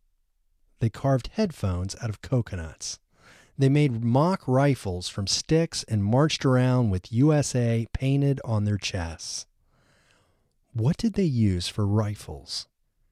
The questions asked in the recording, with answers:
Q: What did they use for rifles?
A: They used sticks for rifles.